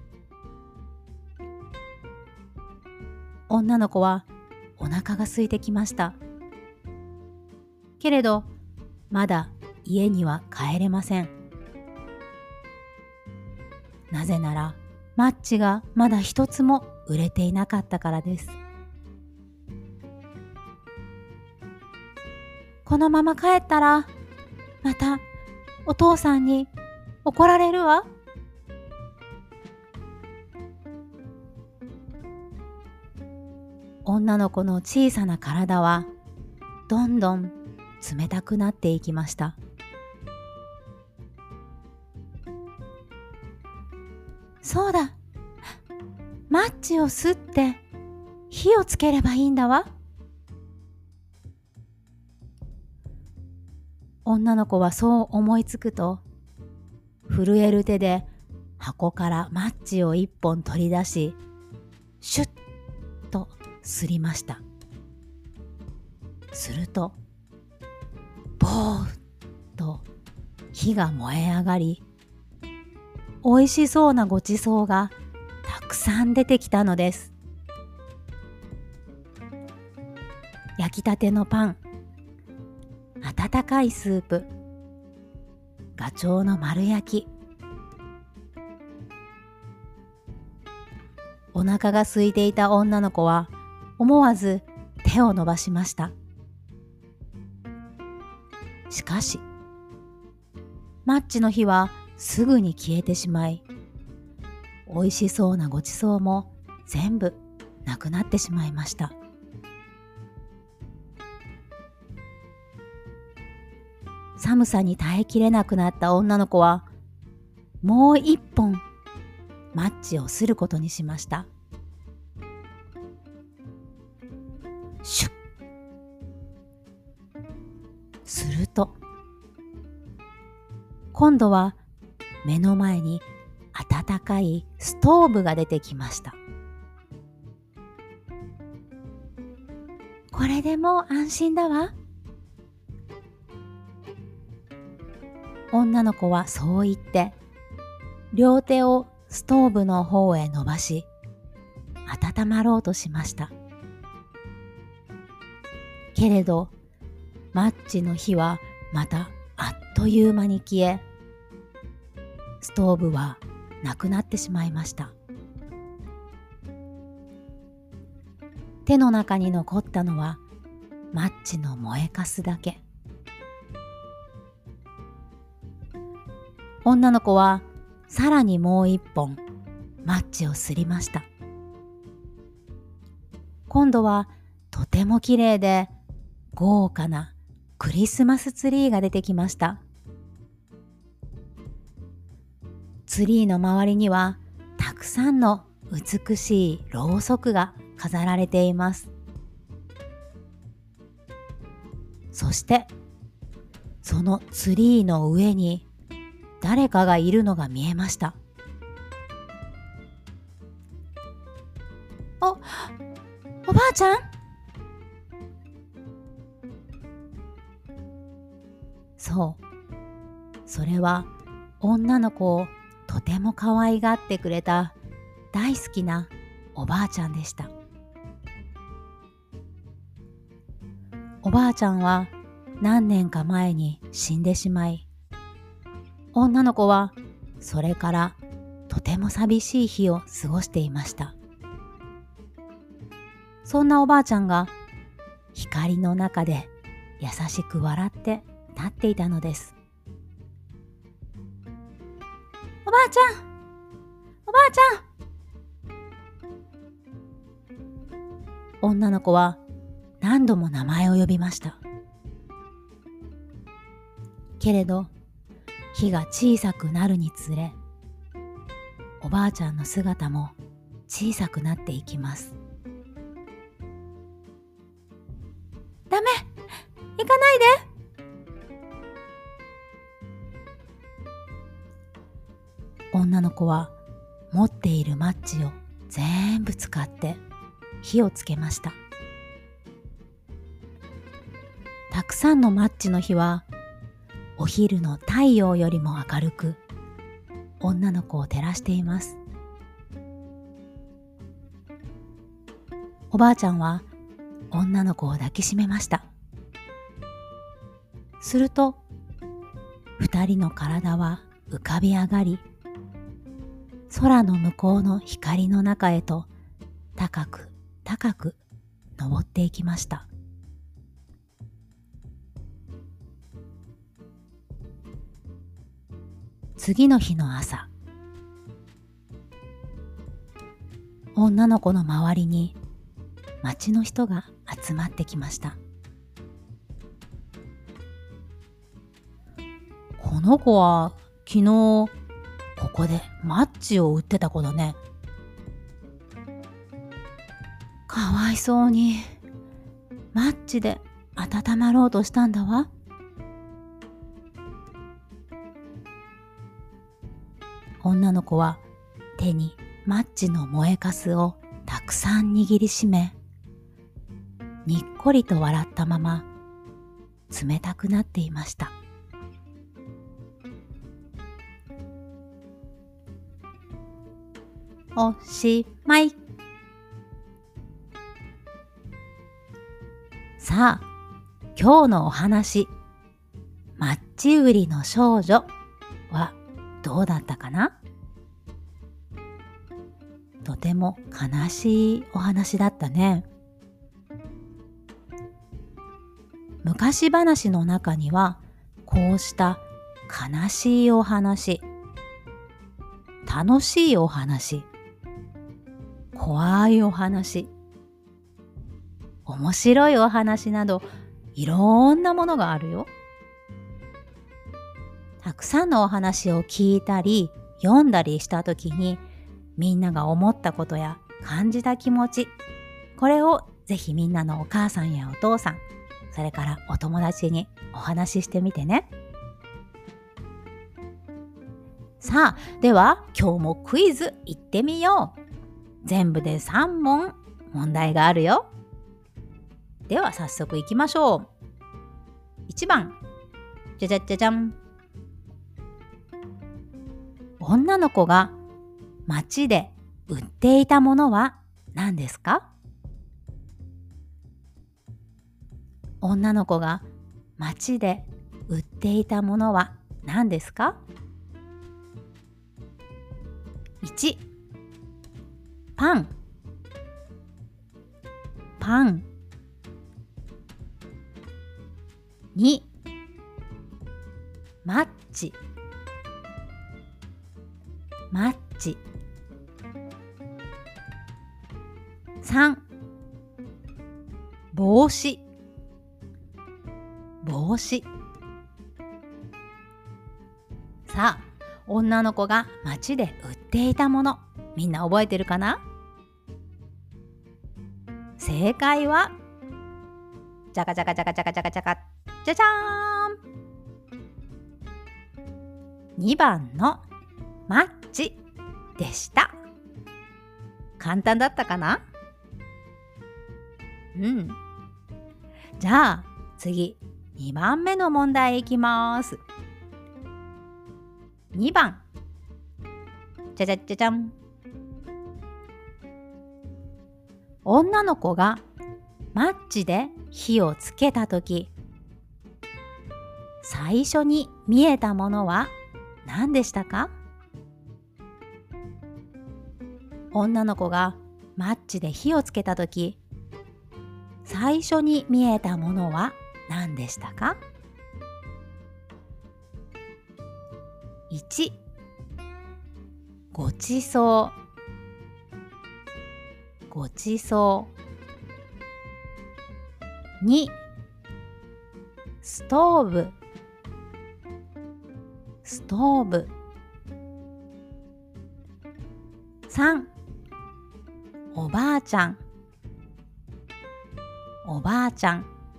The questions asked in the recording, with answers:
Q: 女の子がマッチで火をつけたとき、最初に見えたものは何でしたか?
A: 1番のごちそうでした。